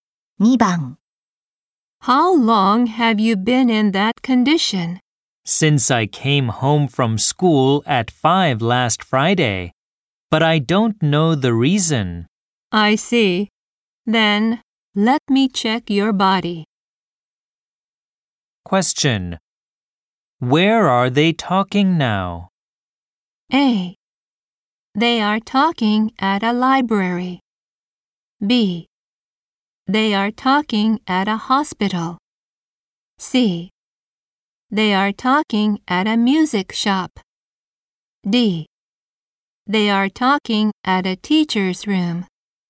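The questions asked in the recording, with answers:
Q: Where are they talking now?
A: B: They are talking at a hospital.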